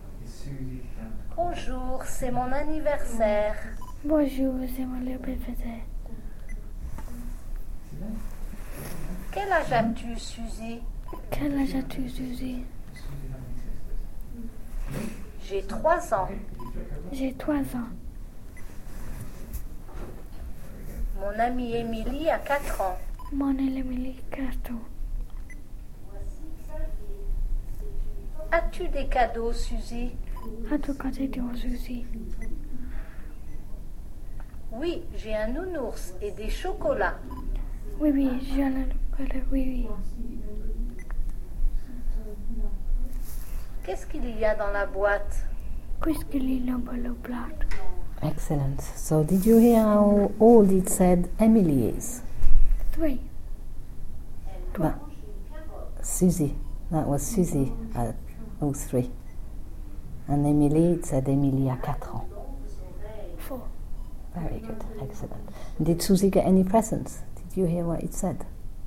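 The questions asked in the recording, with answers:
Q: Did Suzy get any presents?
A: Yes, a teddy bear and chocolates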